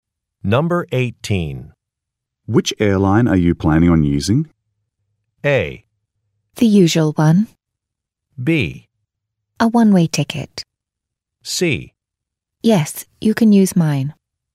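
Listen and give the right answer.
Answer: A: The usual one.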